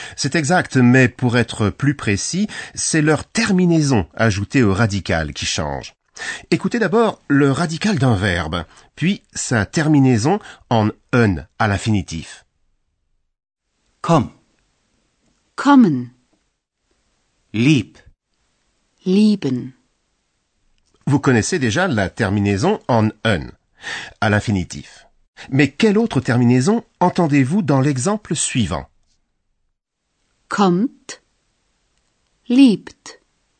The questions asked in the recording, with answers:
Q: Mais quelle autre terminaison entendez-vous dans l'exemple suivant Kommt, liebt.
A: j'ai entendu un t, un t.